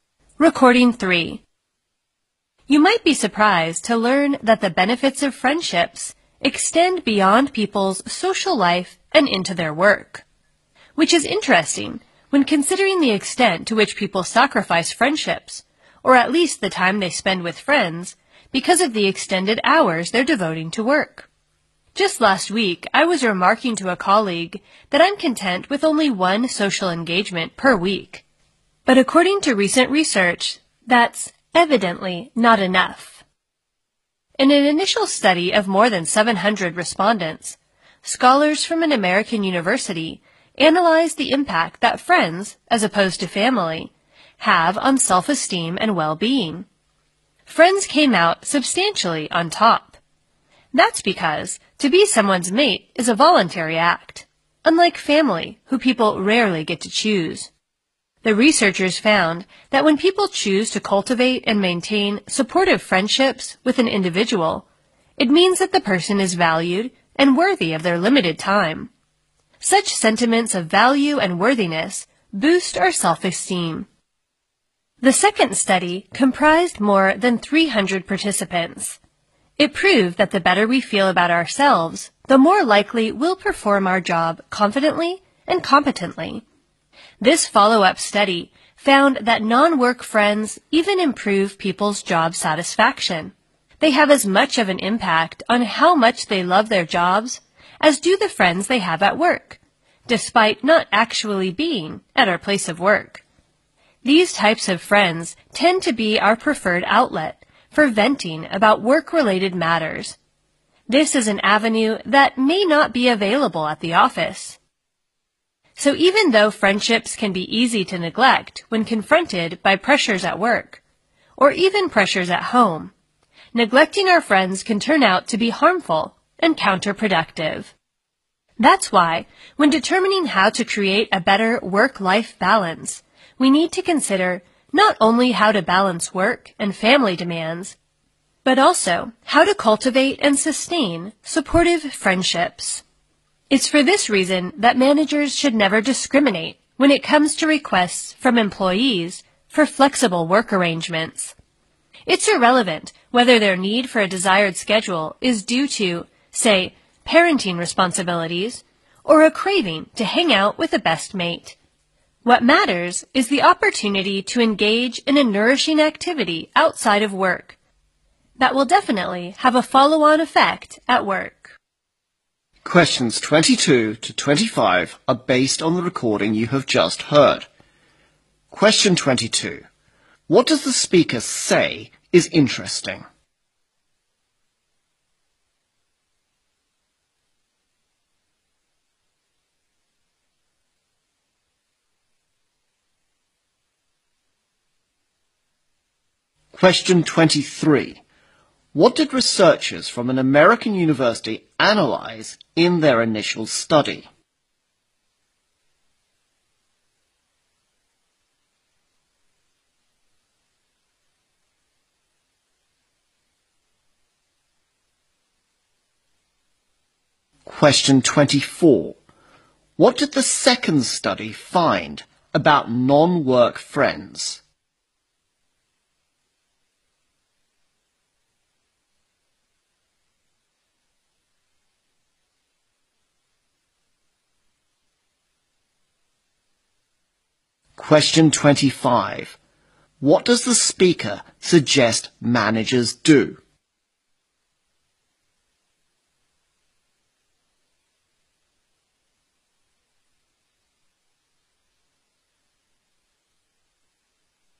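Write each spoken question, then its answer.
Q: What does the speaker say is interesting?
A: People sacrifice friendships for work even though friendships benefit their work.

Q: What did researchers from an American university analyze in their initial study?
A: The impact of friends versus family on self-esteem and well-being.

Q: What did the second study find about non-work friends?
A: They improve people's job satisfaction.

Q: What does the speaker suggest managers do?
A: Never discriminate among employees' requests for flexible work arrangements.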